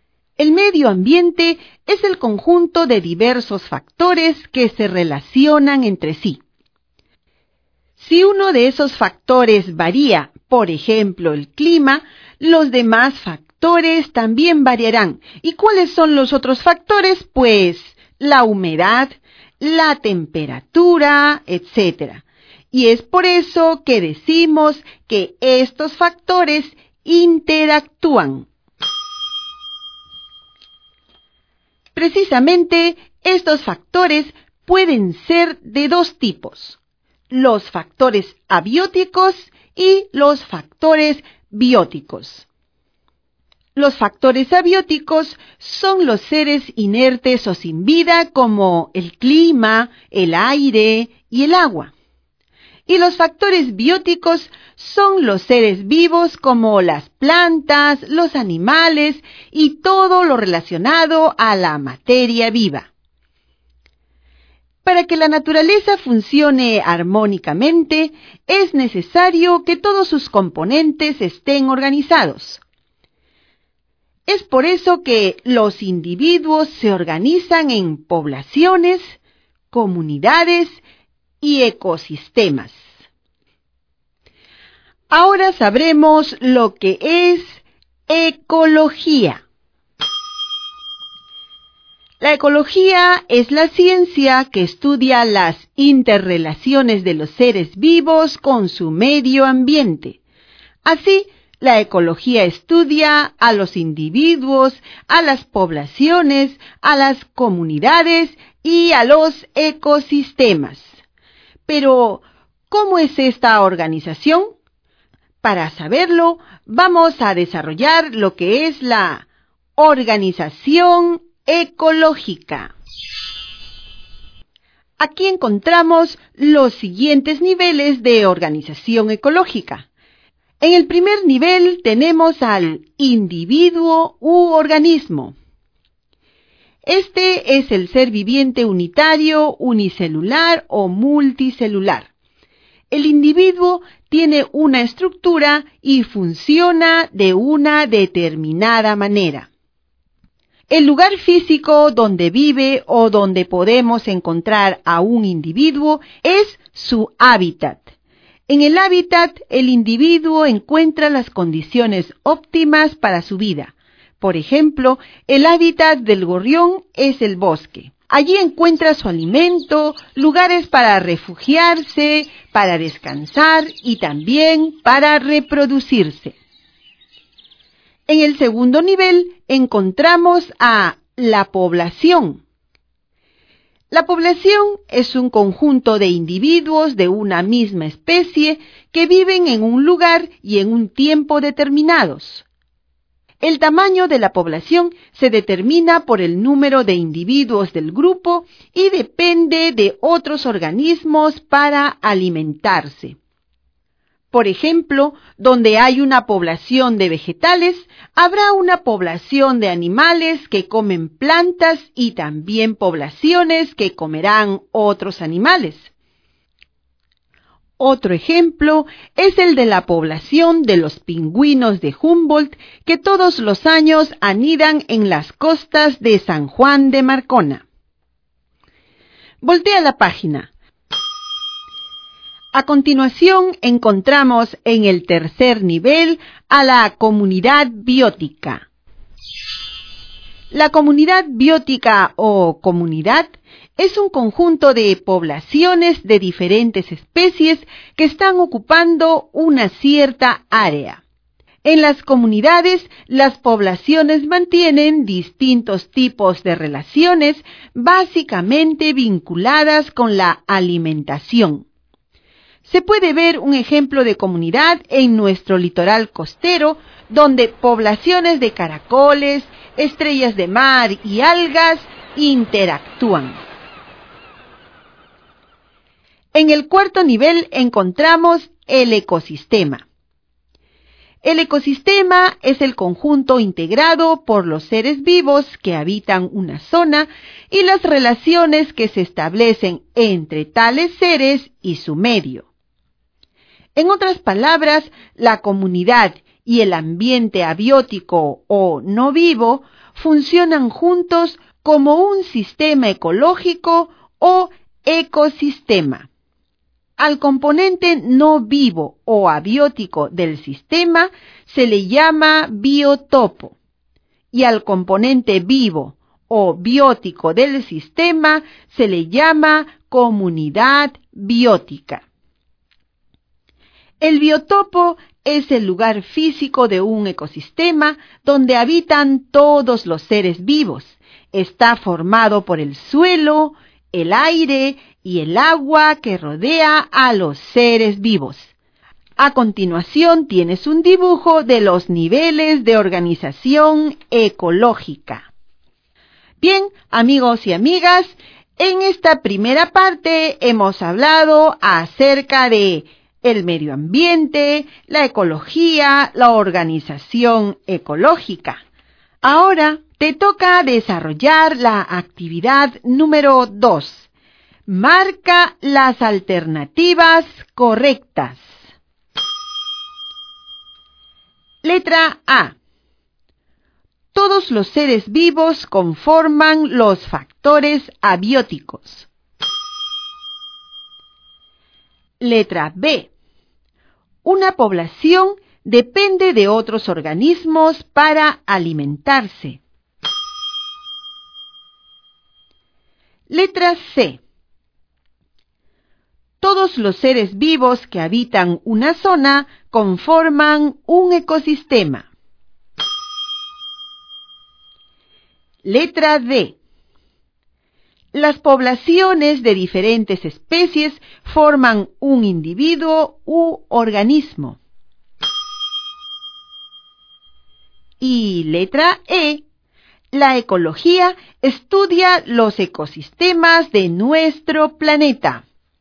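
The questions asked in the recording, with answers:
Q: Letra A. Todos los seres vivos conforman los factores abióticos.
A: Incorrecta

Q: Letra B. Una población depende de otros organismos para alimentarse.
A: Correcta

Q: Letra D. Las poblaciones de diferentes especies forman un individuo u organismo.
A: Incorrecta

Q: Y letra E. La ecología estudia los ecosistemas de nuestro planeta.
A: Correcta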